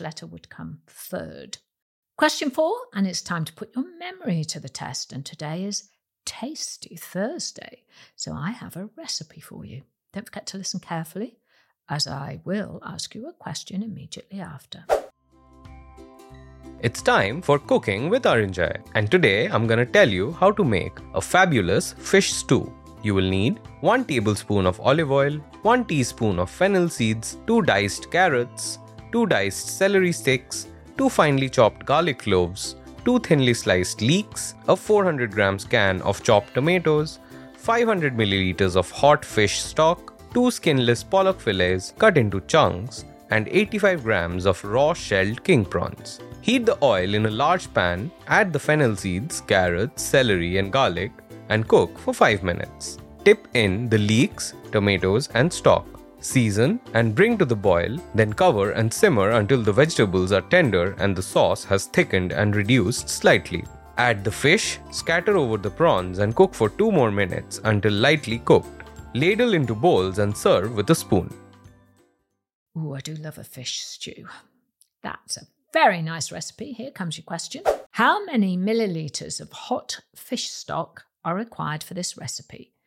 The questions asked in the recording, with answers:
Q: How many millilitres of hot fish stock are required for this recipe?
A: The answer is 500 millilitres of hot fish stock.